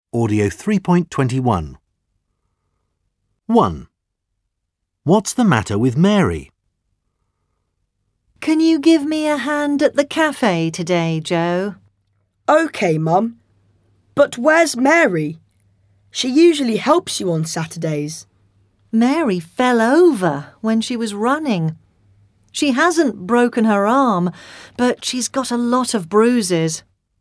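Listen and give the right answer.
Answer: She fell over and has a lot of bruises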